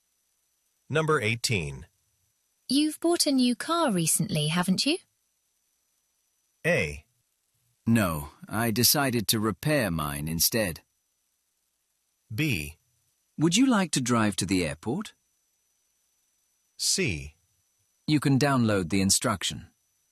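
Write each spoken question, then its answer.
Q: You've bought a new car recently, haven't you?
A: A: No, I decided to repair mine instead.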